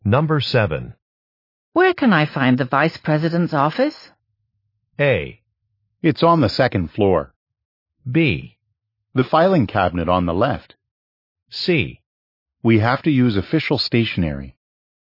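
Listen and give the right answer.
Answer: A: It's on the second floor.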